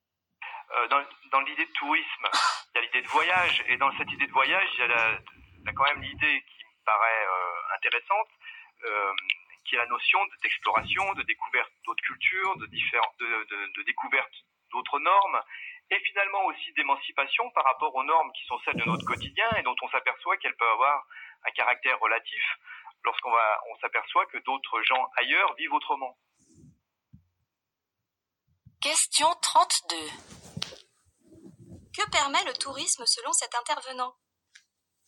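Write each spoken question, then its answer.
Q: Que permet le tourisme selon cet intervenant ?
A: De découvrir d'autres cultures et d'autres normes, et de s'émanciper des normes du quotidien en voyant qu'elles sont relatives.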